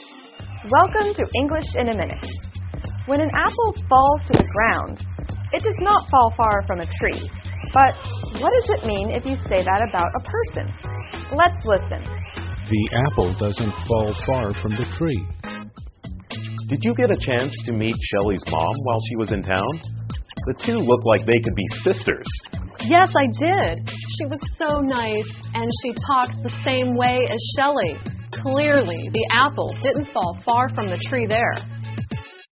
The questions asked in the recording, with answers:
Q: But what does it mean if you say that about a person?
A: If the apple does not fall far from the tree, it means two people are very similar.